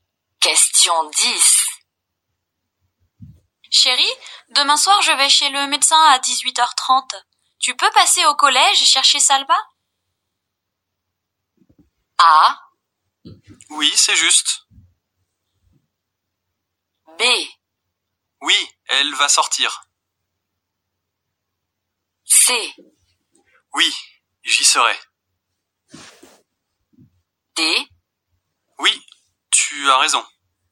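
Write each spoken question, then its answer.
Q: Tu peux passer au collège chercher Salva?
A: C: Oui, j'y serai.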